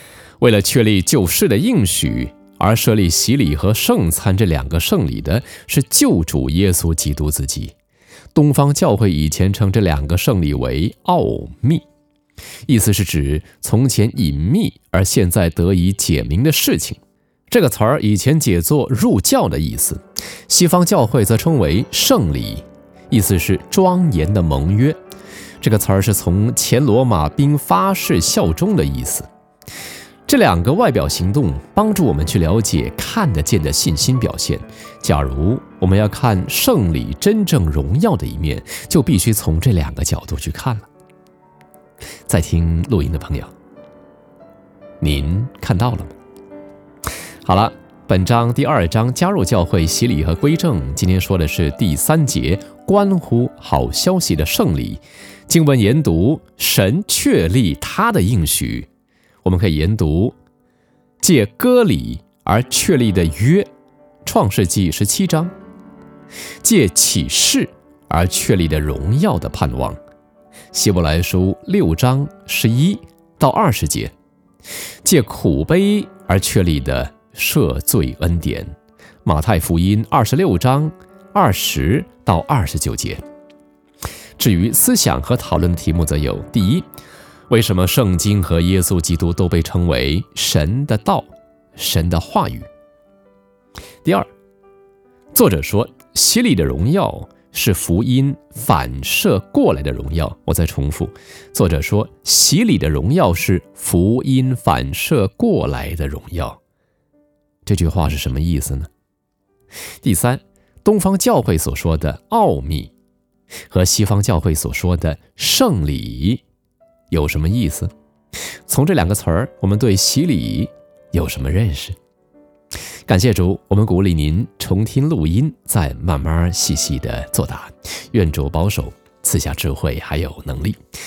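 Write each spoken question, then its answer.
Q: 东方教会所说的奥秘和西方教会所说的圣礼有什么意思?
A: 奥秘指从前隐秘而现在得以解明的事情;圣礼意思是庄严的盟约(原指罗马兵发誓效忠)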